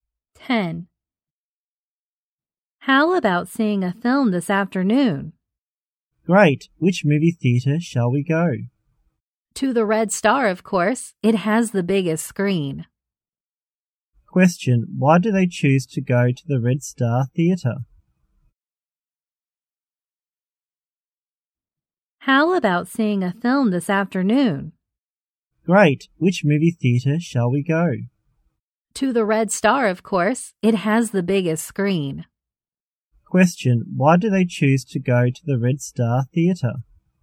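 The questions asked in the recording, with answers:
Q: why do they choose to go to the Red Star Theater?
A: It has the biggest screen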